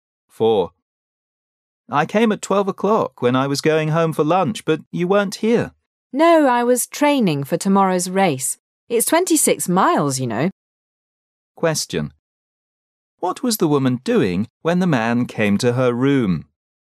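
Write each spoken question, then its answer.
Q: What was the woman doing when the man came to her room?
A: Training for a race

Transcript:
[解析] M: I came at 12 o'clock when I was going home for lunch, but you weren't here. W: No, I was training for tomorrow's race. It's 26 miles, you know. Q: What was the woman doing when the man came to her room?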